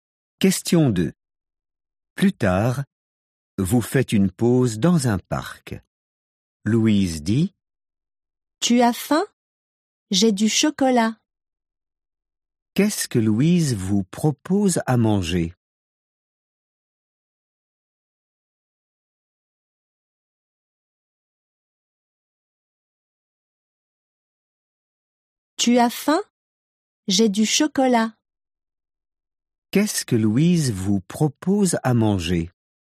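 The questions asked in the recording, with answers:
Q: Qu'est-ce que Louise vous propose à manger?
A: Du chocolat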